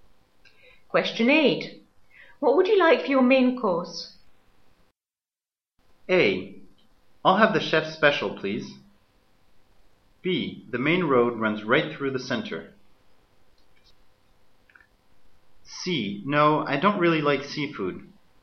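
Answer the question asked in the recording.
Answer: A: I'll have the chef's special, please.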